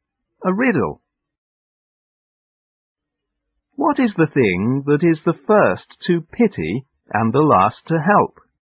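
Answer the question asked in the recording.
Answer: The letter P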